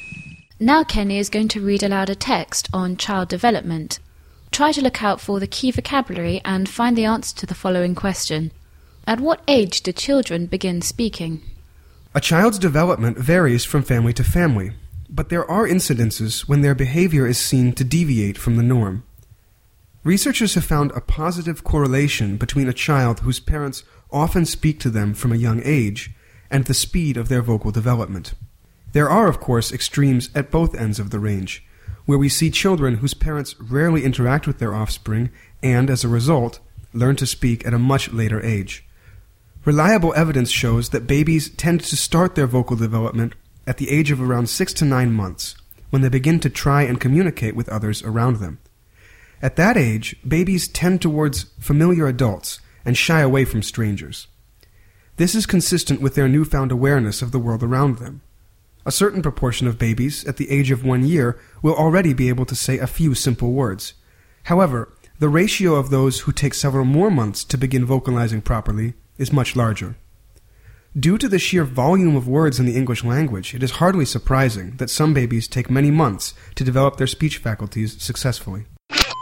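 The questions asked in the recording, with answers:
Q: At what age do children begin speaking?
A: Around 6 to 9 months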